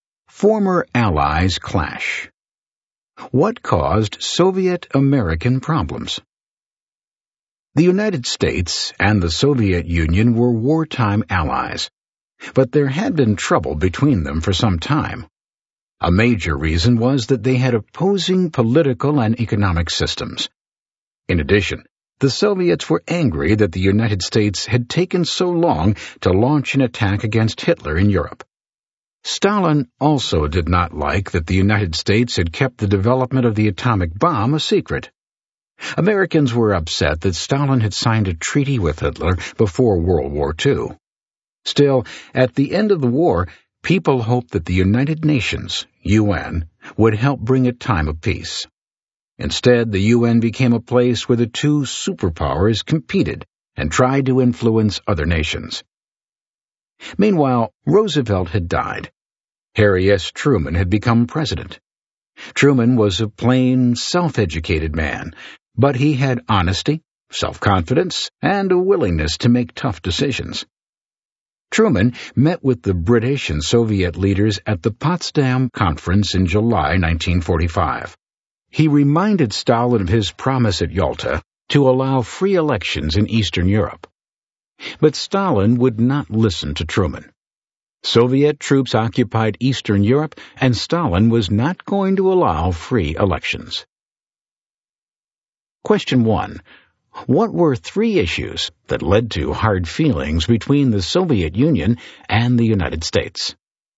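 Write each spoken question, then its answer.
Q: What were three issues that led to hard feelings between the Soviet Union and the United States?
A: Their opposing political and economic systems, the long US delay in attacking Hitler in Europe, and the secret development of the atomic bomb (Americans were also upset by Stalin's treaty with Hitler)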